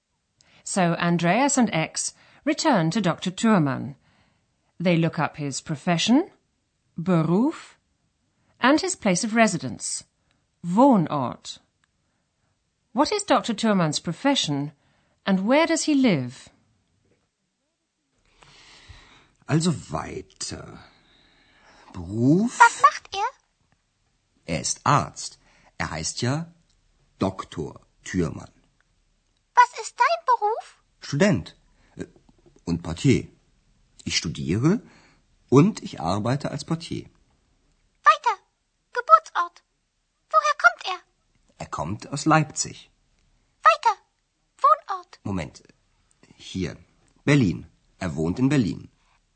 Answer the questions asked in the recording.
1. Dr. Thürmann is a physician,
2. and he lives in Berlin.